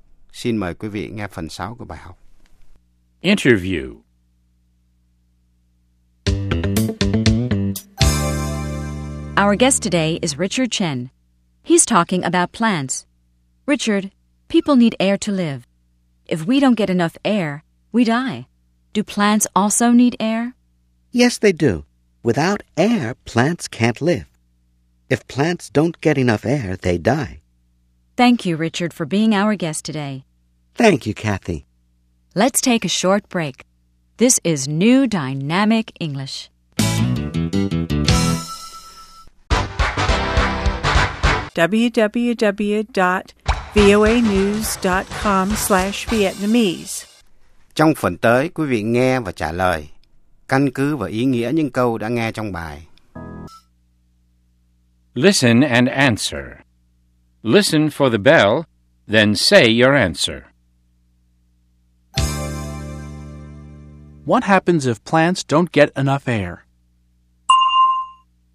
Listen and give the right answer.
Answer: They die. If plants don't get enough air, they die.